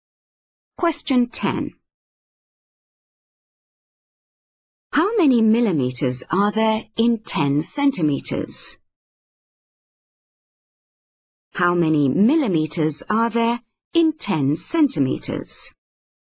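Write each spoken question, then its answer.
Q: How many millimeters are there in 10 centimeters?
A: 100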